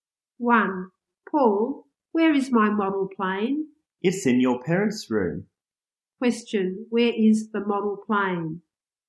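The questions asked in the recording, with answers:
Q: Question, where is the model plane?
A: In the parents' room.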